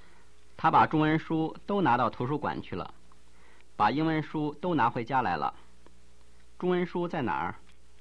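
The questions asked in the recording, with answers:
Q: 中文书在哪儿?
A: 在图书馆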